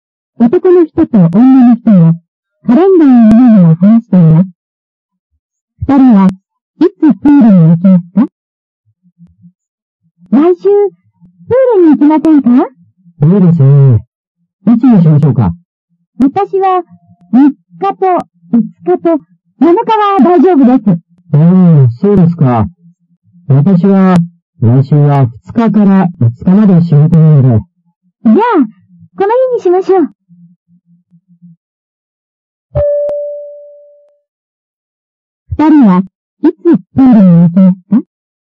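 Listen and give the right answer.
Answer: 7日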